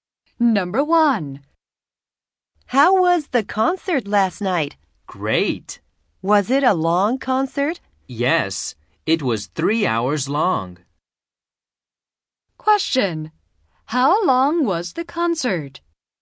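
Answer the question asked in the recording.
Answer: 3 hours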